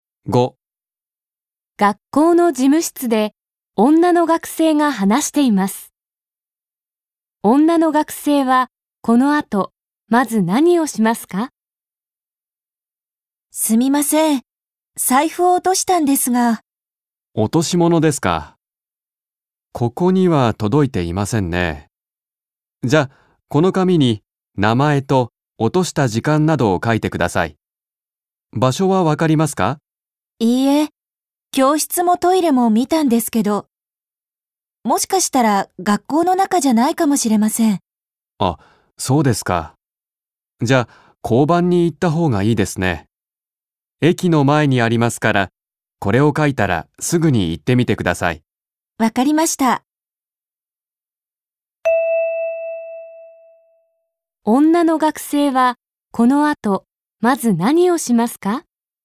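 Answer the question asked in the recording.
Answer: 紙に名前と落とした時間などを書く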